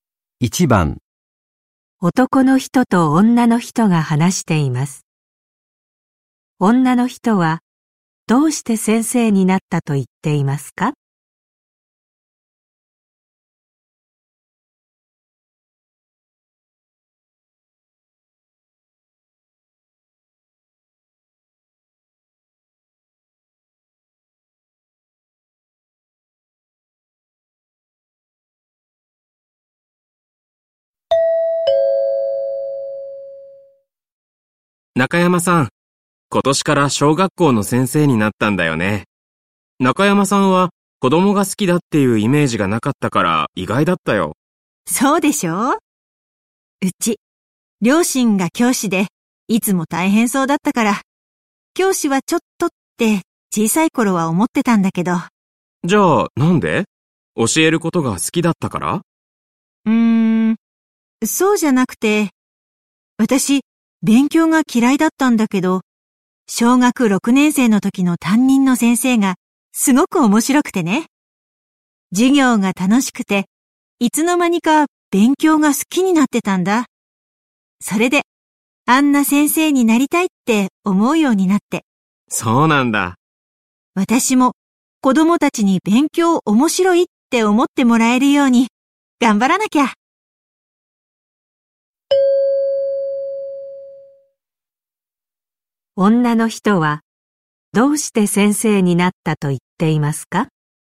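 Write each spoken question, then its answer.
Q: 女の人はどうして先生になったと言っていますか?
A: 小学6年生の時の面白い担任の先生のようになりたいと思ったから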